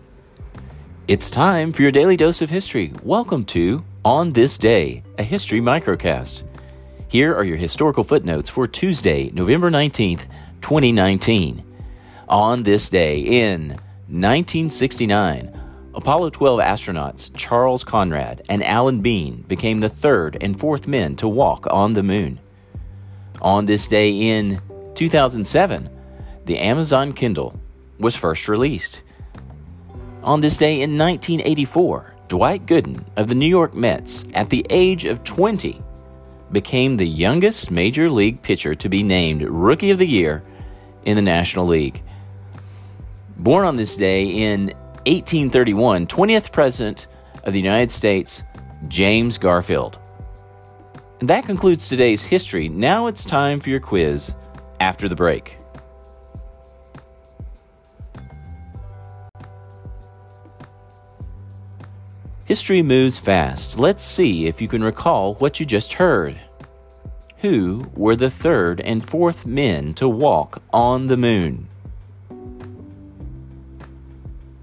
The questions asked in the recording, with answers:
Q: Who were the third and fourth men to walk on the moon?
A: Answer Charles Conrad and Alan Bean.